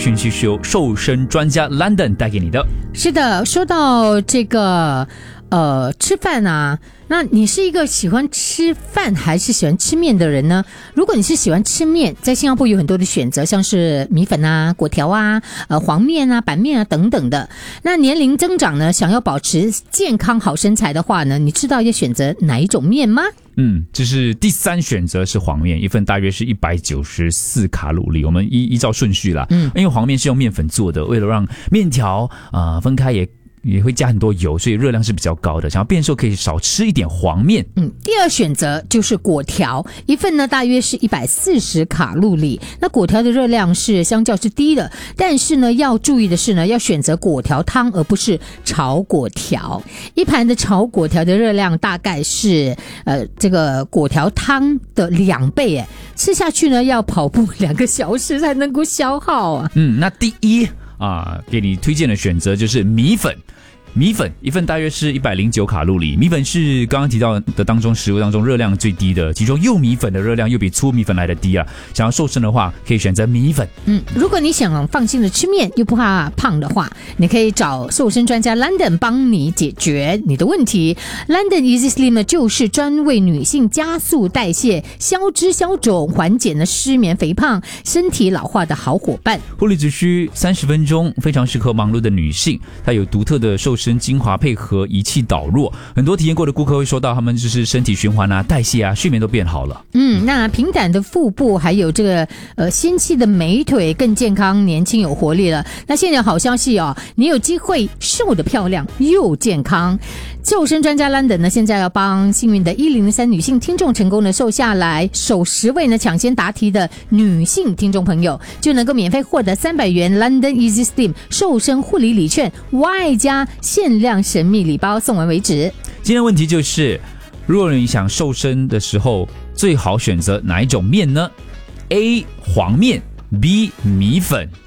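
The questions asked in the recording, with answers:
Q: 如果你想瘦身的时候最好选择哪一种面呢?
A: B: 米粉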